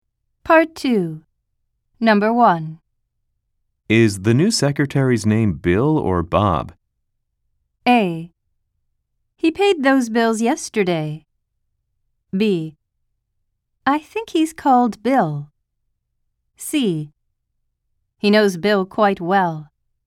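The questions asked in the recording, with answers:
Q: Is the new secretary's name Bill or Bob?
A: B: I think he's called Bill.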